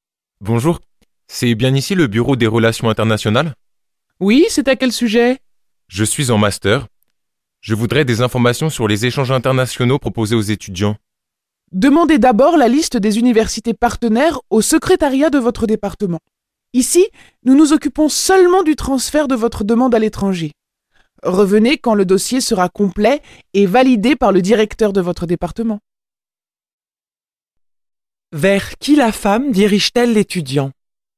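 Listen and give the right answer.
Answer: Vers le secrétariat de son département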